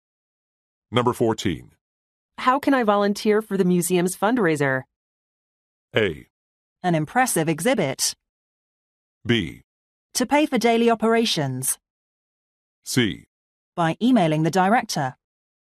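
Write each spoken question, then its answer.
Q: How can I volunteer for the museum's fundraiser?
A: C: By emailing the director.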